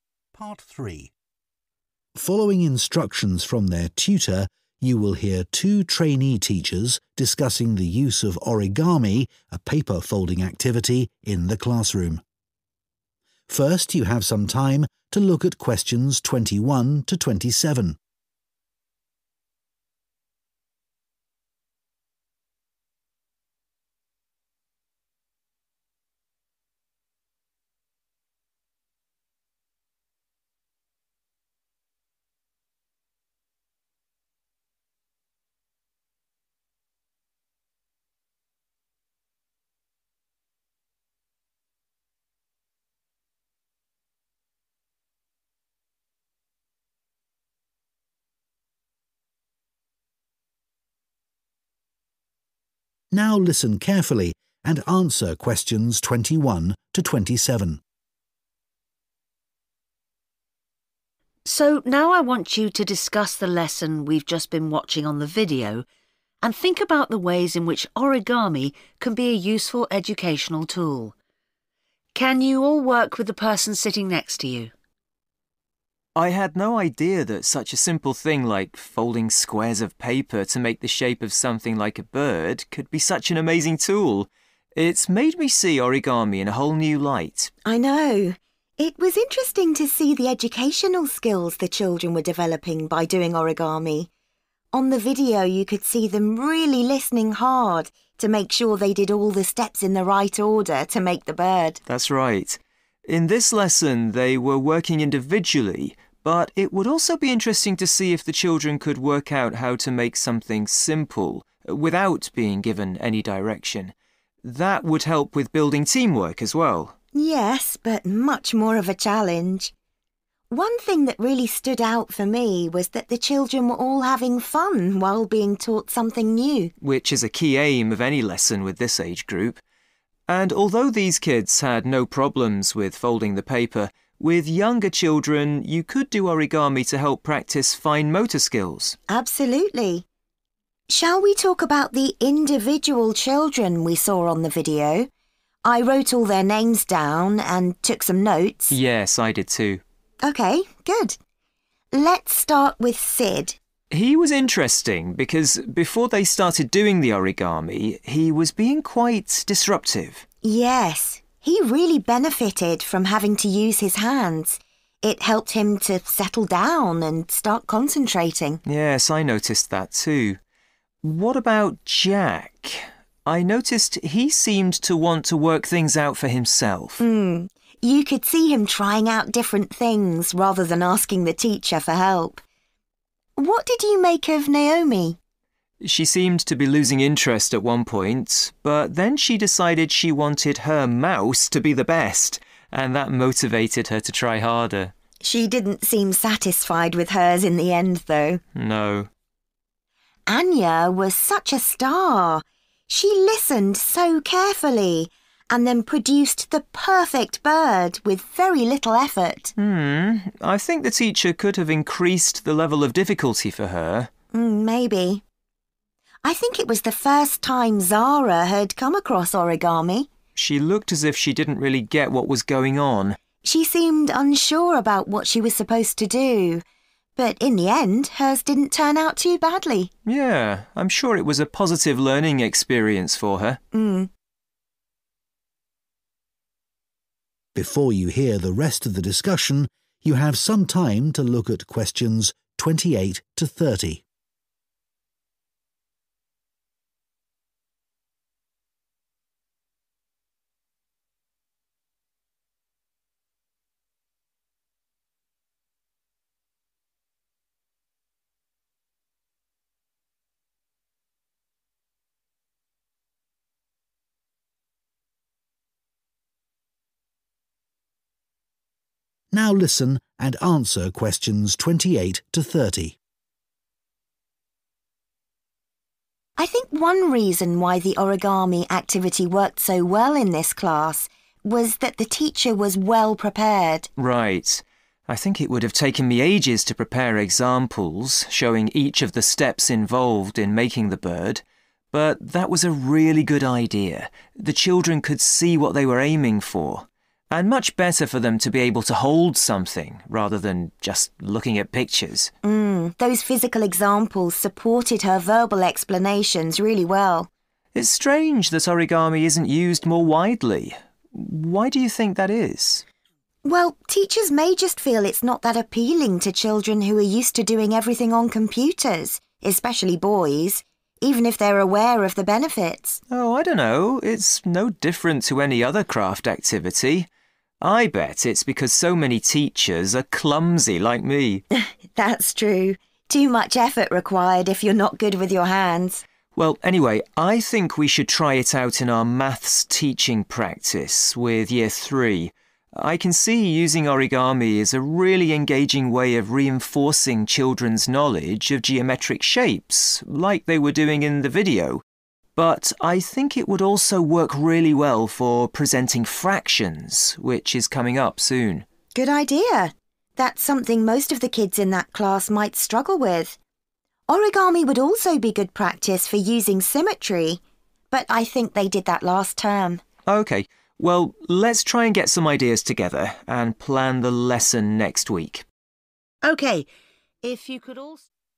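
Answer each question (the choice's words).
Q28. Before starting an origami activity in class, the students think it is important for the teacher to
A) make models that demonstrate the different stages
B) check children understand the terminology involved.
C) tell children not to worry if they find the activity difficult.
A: make models that demonstrate the different stages

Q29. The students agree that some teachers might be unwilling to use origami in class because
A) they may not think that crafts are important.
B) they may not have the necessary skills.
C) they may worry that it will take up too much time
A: they may not have the necessary skills.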